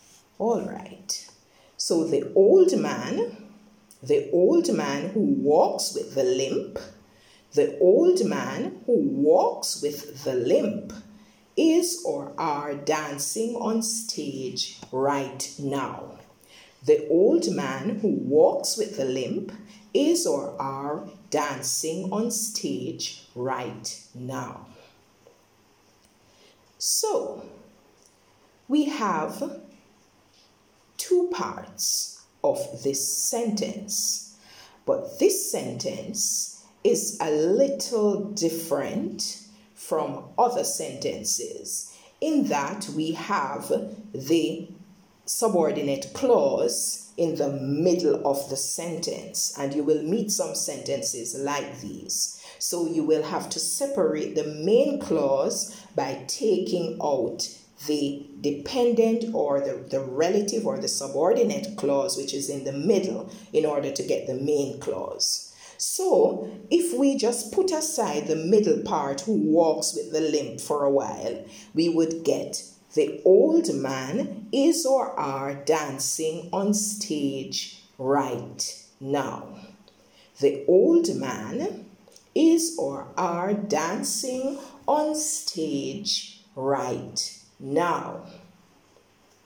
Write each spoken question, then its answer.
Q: The old man is or are dancing on stage right now.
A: Now, if you said is, you would be correct.